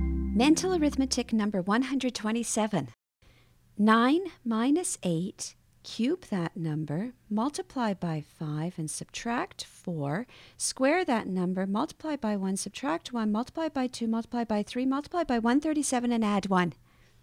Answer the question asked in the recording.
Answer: And the answer is 1.